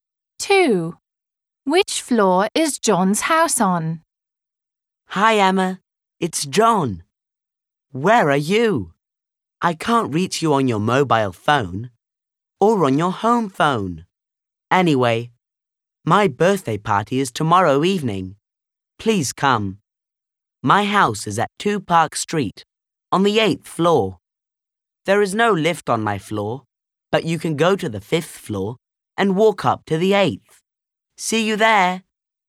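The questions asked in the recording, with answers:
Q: Which floor is John's house on?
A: The 8th floor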